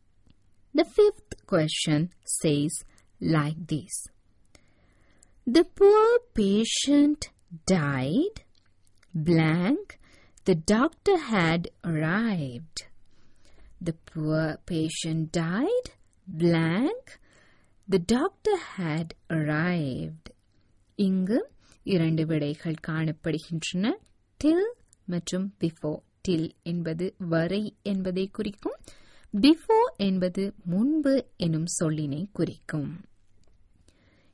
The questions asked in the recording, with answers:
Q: The poor patient died, blank, the doctor had arrived.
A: The poor patient died before the doctor had arrived.